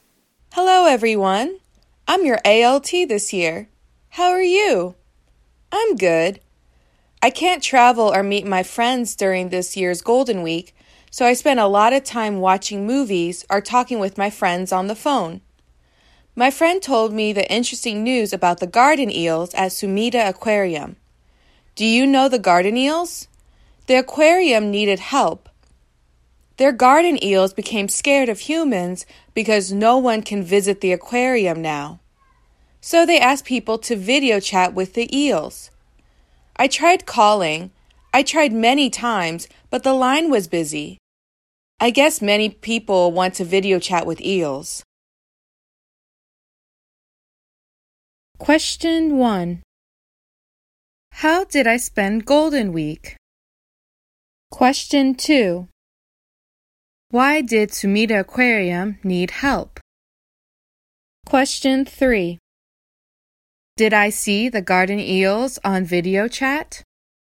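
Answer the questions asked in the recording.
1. Watching movies and talking with friends on the phone.
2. Their garden eels became scared of humans because no one can visit the aquarium.
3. No, the line was busy.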